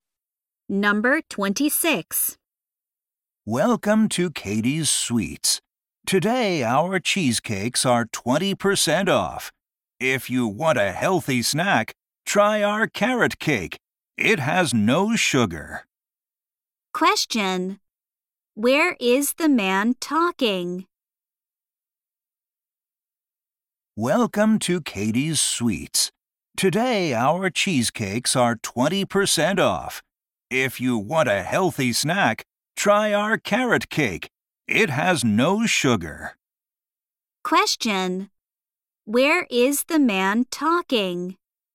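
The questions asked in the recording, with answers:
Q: Where is the man talking?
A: At a sweets shop (Katie's Sweets)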